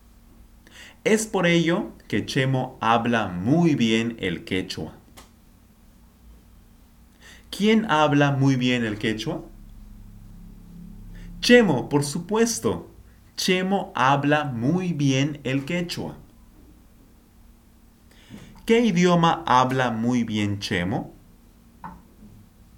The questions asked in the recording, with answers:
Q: ¿Qué idioma habla muy bien Chemo?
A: El quechua, el quechua, por supuesto, el quechua.